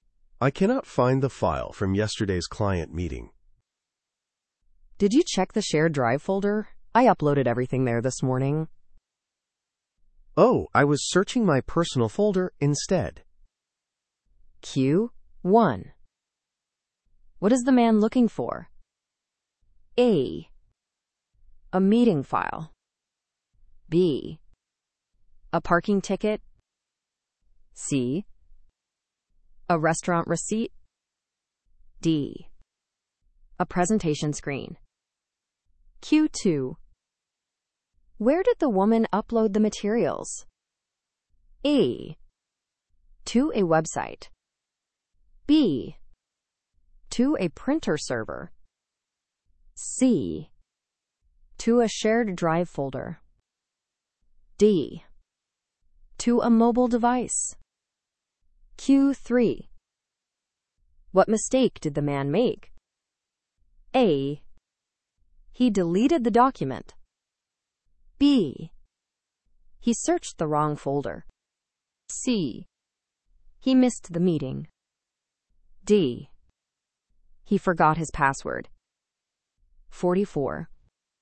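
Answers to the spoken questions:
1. A: A meeting file.
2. C: To a shared drive folder.
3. B: He searched the wrong folder.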